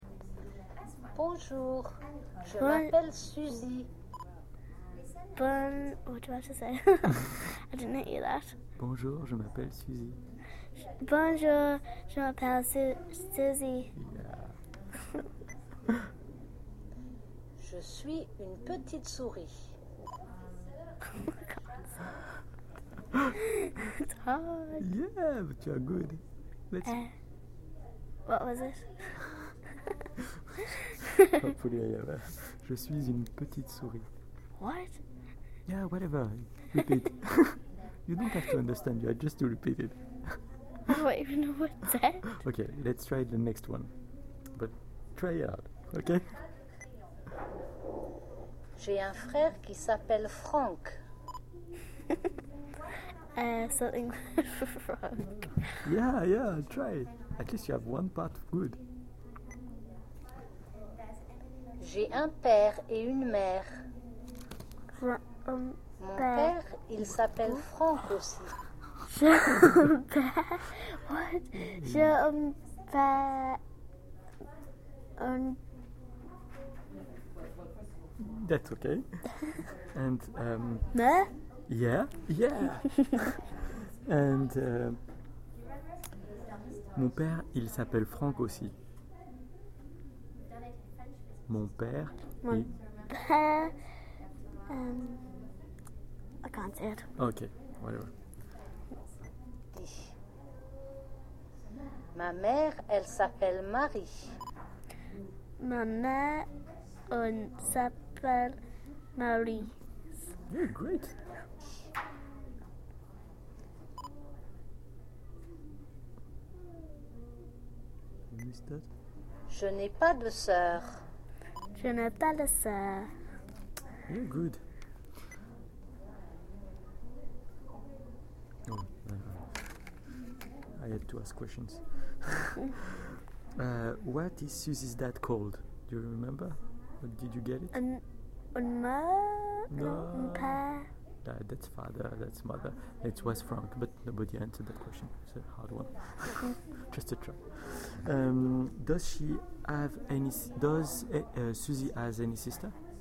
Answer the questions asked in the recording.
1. It was Frank
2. No